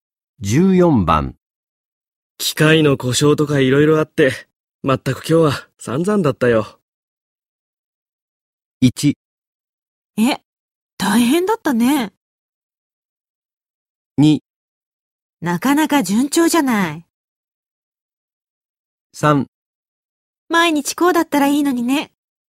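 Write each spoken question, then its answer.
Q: 機械の故障とか色々あって、まったく今日は散々だったよ。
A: 1: え、大変だったね。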